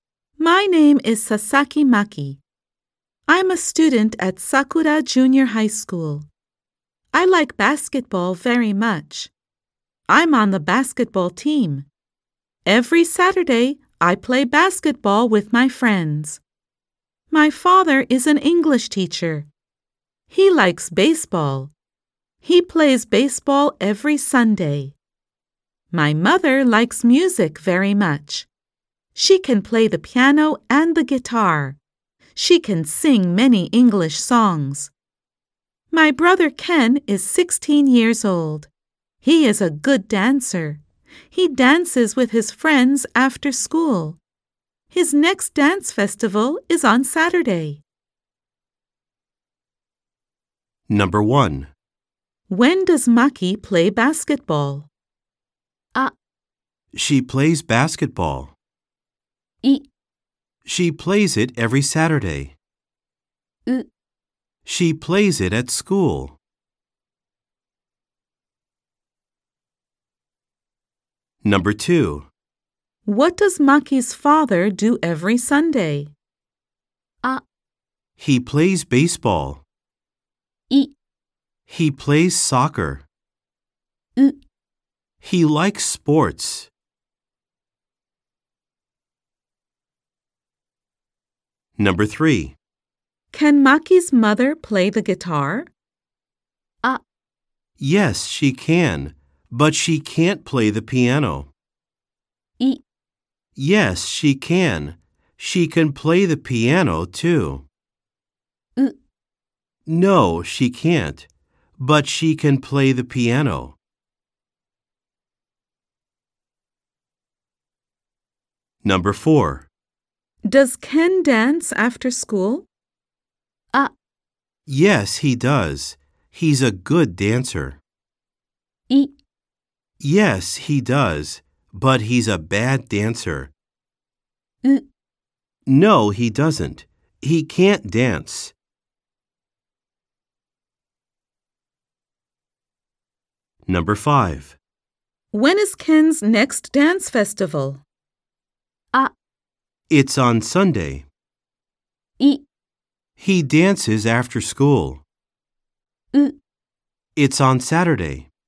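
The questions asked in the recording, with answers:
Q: What does Maki's father do every Sunday?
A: A: He plays baseball.

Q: Can Maki's mother play the guitar?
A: B: Yes, she can. She can play the piano, too.

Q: Does Ken dance after school?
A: A: Yes, he does. He's a good dancer.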